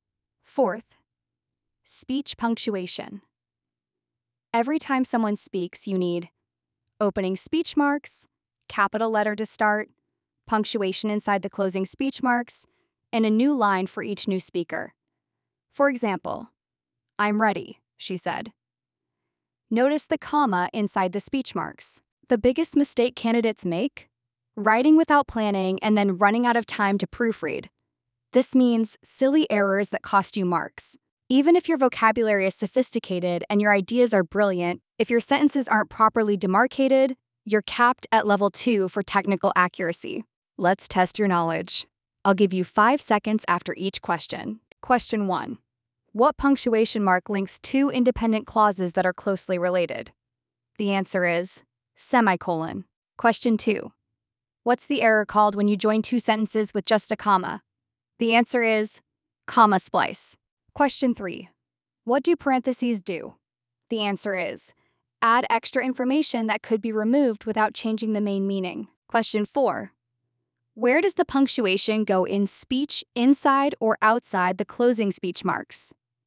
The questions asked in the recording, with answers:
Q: Where does the punctuation go in speech inside or outside the closing speech marks?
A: The answer is inside.